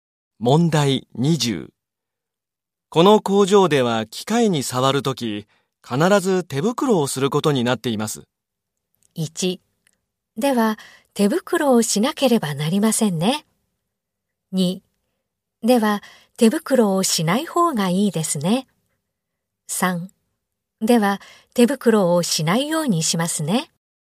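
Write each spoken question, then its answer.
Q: この工場では機械に触るとき必ず手袋をすることになっています。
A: 1: では手袋をしなければなりませんね。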